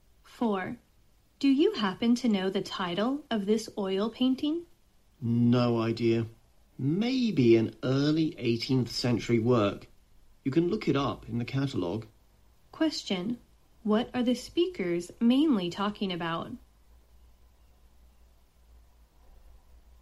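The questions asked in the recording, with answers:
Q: What are the speakers mainly talking about?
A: An oil painting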